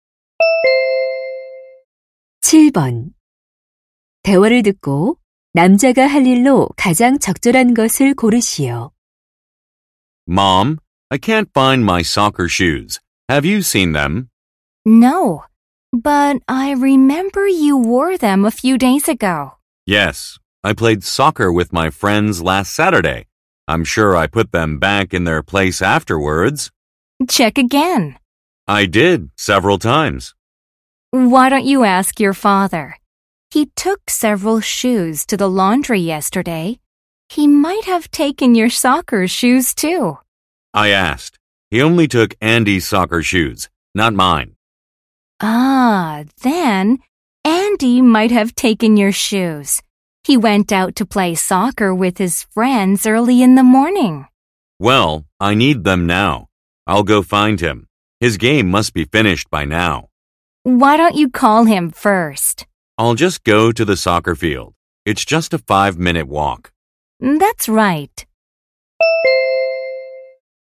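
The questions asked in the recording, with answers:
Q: 대화를 듣고 남자가 할 일로 가장 적절한 것을 고르시오.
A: 축구장에 가서 Andy 찾기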